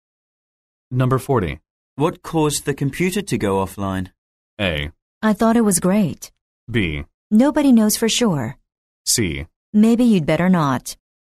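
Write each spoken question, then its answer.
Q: What caused the computer to go offline?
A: B: Nobody knows for sure.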